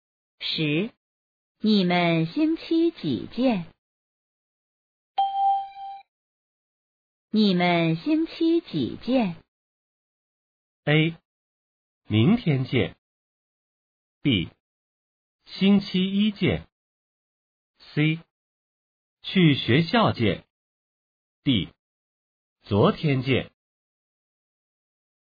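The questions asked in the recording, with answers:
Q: 你们星期几见?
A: B: 星期一见。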